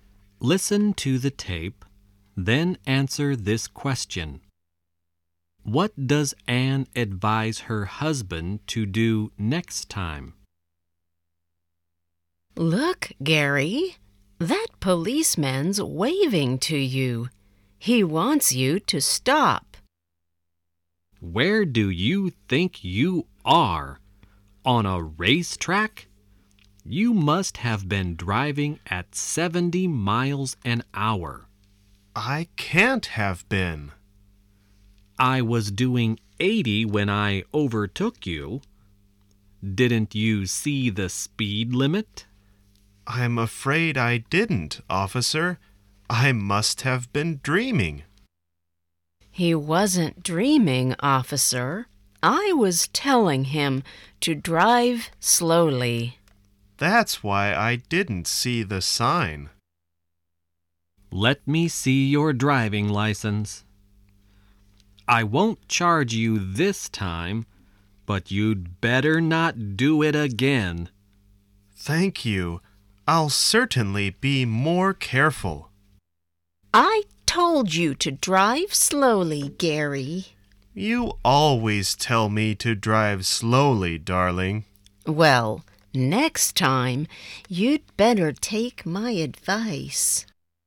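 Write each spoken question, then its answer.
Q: What does Anne advise her husband to do next time?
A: To take her advice and drive slowly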